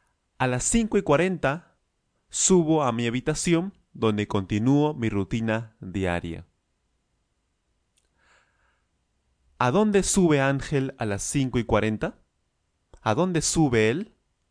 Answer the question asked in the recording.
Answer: A su habitación, por supuesto.